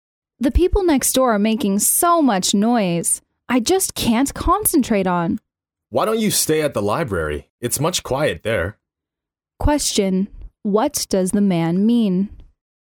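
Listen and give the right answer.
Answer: She should go to the library to study because it's quieter there.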